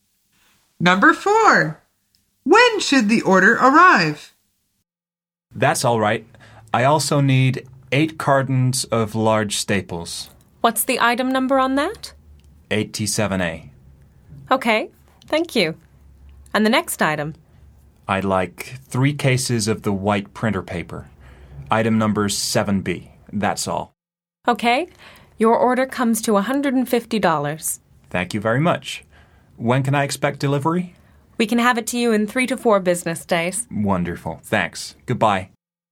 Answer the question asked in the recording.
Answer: The answer is in 3 or 4 business days